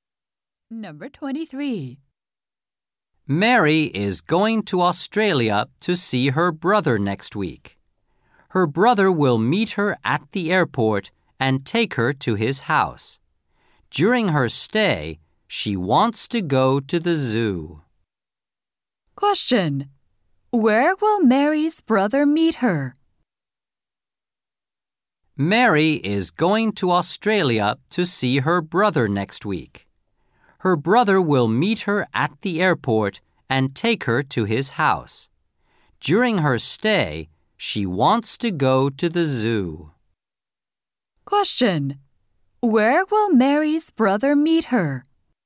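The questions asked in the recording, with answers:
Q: Where will Mary's brother meet her?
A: At the airport.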